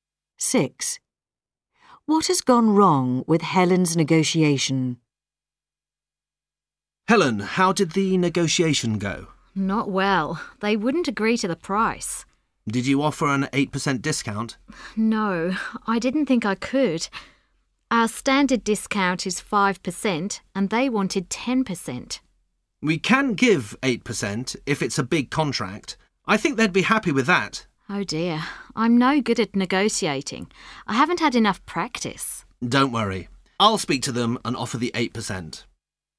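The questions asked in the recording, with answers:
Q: What has gone wrong with Helen's negotiation?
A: She didn't offer the 8% discount, so they didn't agree to the price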